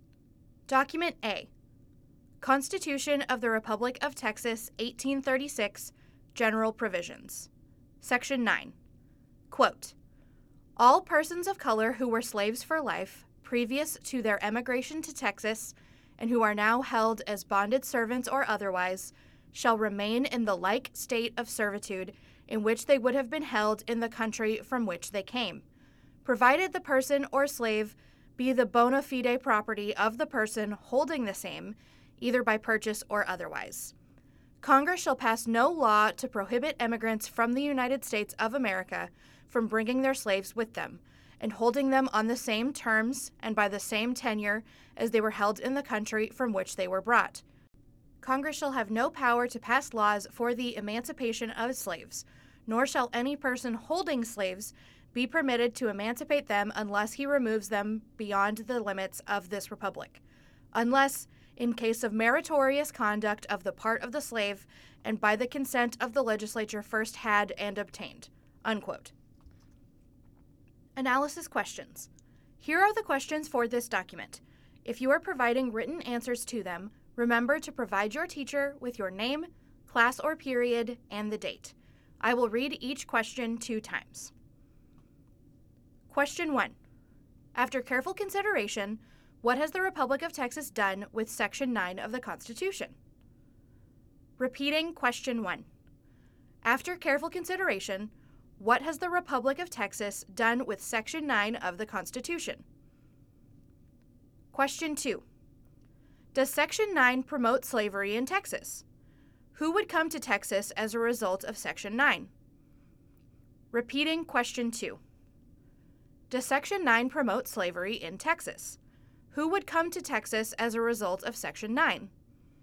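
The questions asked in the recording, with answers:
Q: Does Section 9 promote slavery in Texas? Who would come to Texas as a result of Section 9?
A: Yes; emigrants from the United States bringing their slaves (slaveholders) would come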